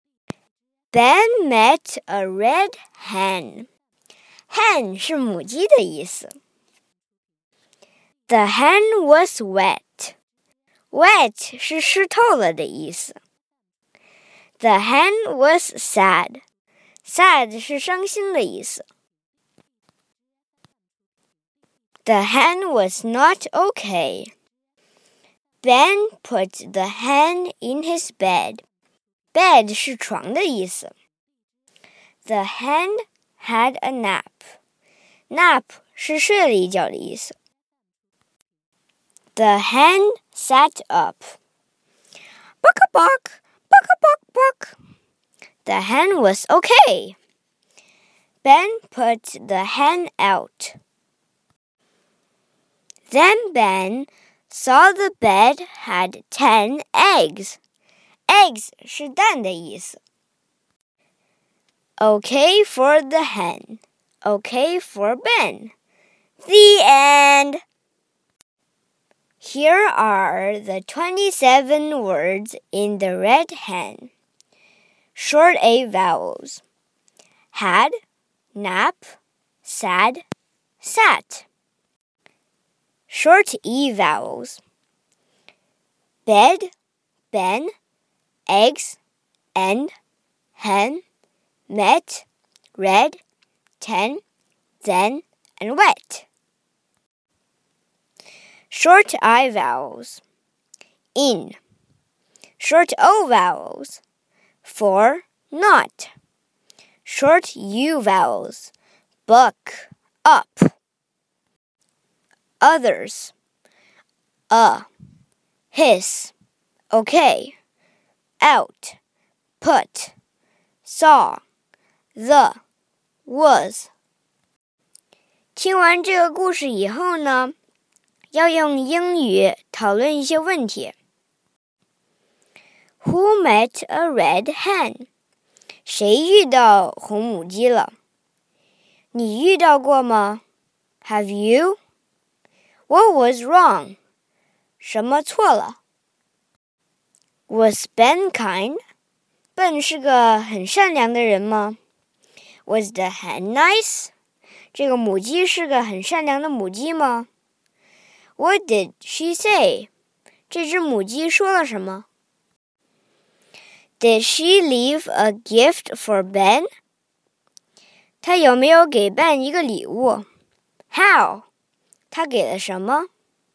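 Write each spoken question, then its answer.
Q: Who met a red hen?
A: Ben

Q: What was wrong?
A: The hen was wet and sad, not okay

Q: was Ben kind?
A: Yes

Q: What did she say?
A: Buck a buck, buck a buck buck

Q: Did she leave a gift for Ben?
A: Yes, ten eggs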